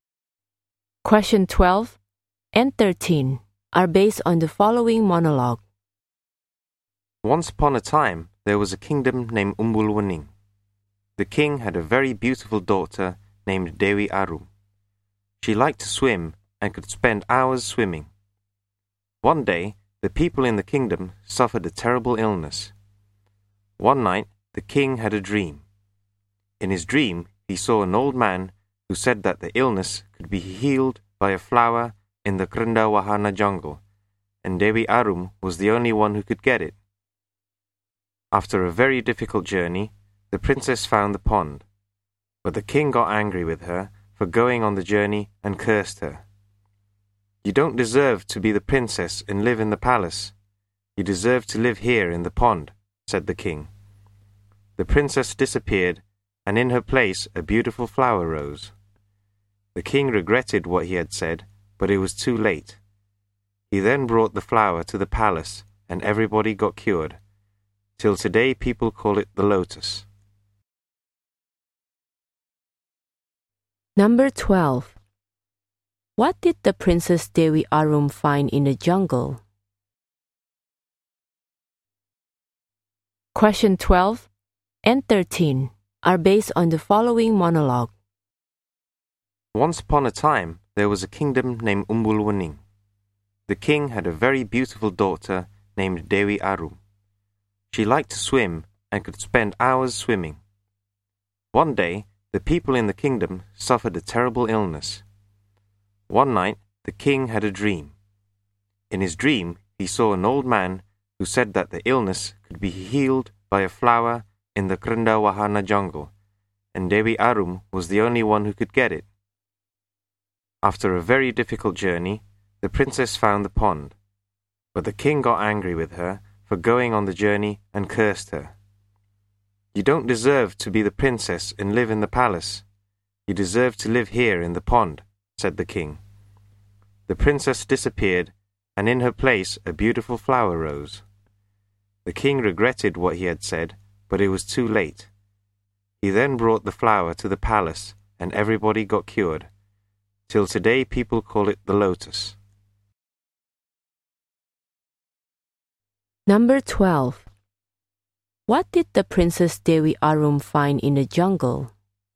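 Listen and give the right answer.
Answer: A pond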